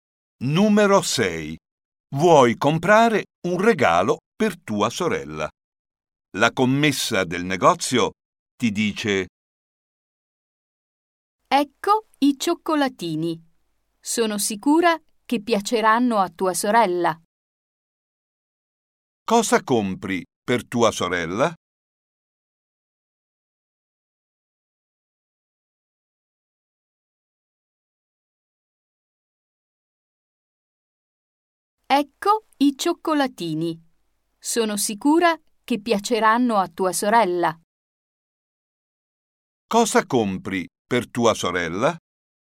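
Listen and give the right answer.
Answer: dei cioccolatini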